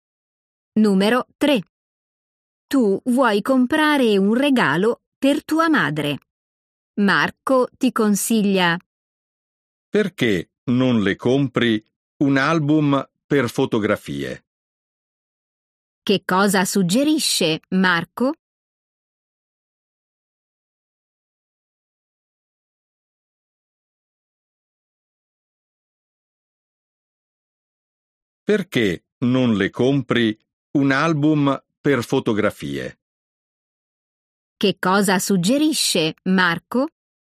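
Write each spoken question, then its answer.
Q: Che cosa suggerisce Marco?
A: un album per fotografie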